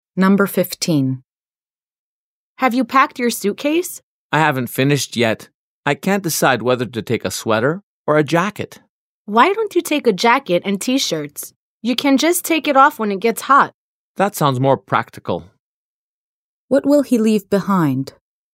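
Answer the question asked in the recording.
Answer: The sweater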